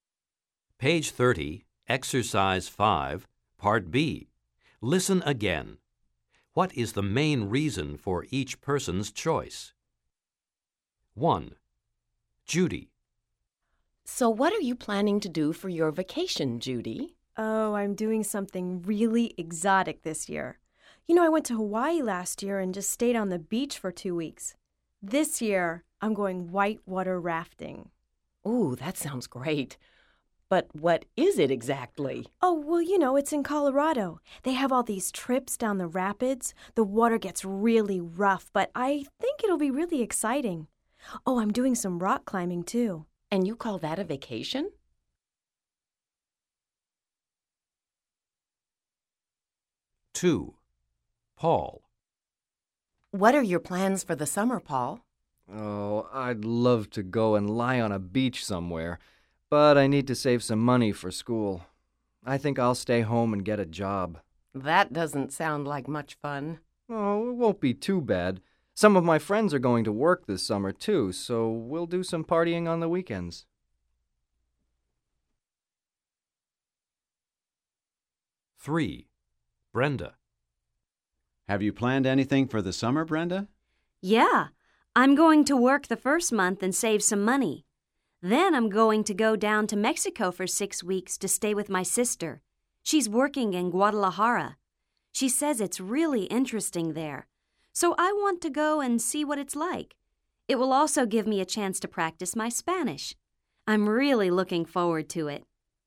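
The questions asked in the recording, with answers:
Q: What is the main reason for each person's choice?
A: Paul needs to save money for school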